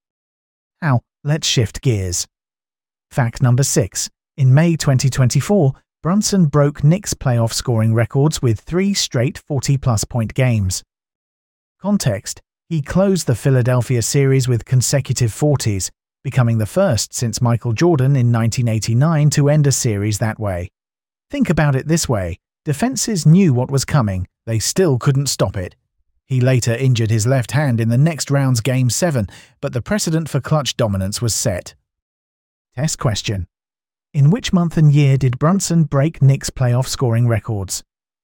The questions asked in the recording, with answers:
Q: In which month and year did Brunson break Knicks playoff scoring records?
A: Correct answer, May 2024.